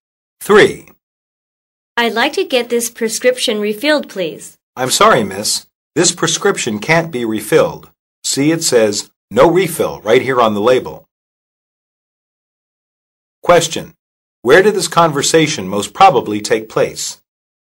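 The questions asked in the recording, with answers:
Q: Where did this conversation most probably take place?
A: At a pharmacy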